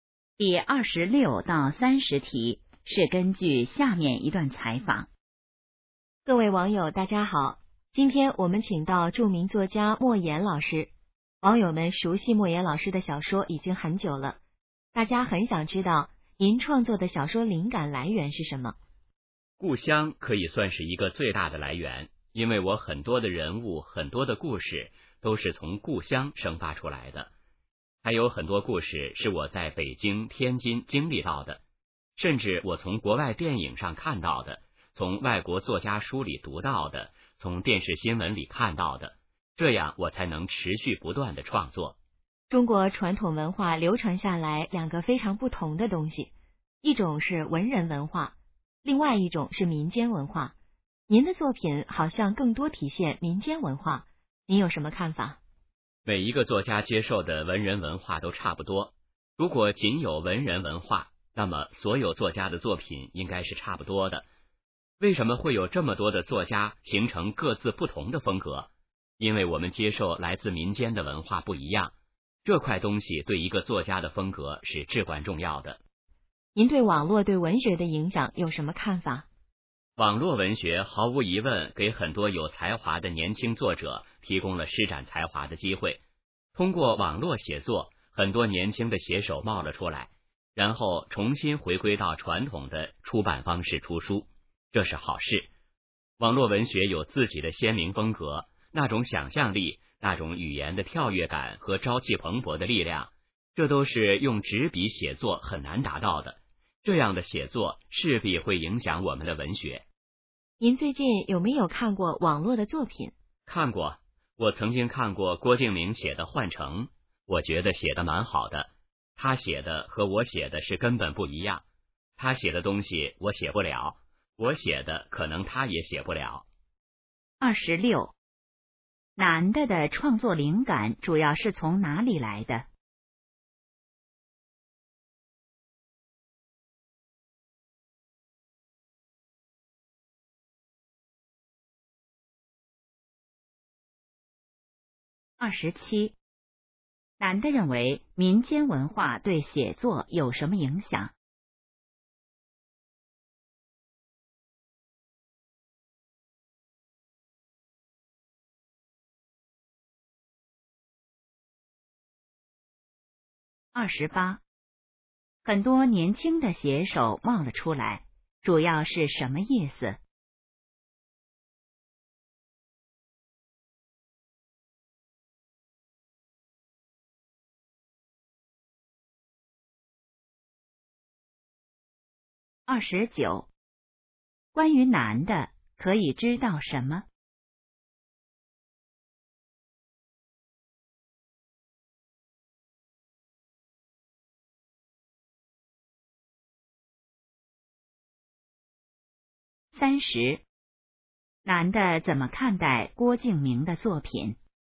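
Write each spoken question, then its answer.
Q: 男的的创作灵感主要是从哪里来的?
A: 故乡

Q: 男的认为民间文化对写作有什么影响?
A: 对作家的风格至关重要

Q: 很多年轻的写手冒了出来,主要是什么意思?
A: 很多年轻写手出现了

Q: 男的怎么看待郭敬明的作品?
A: 写得蛮好,和自己写的根本不一样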